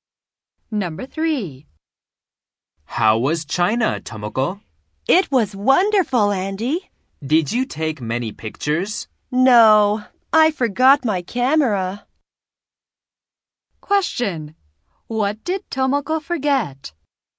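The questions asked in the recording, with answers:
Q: What did Tomoko forget?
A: Her camera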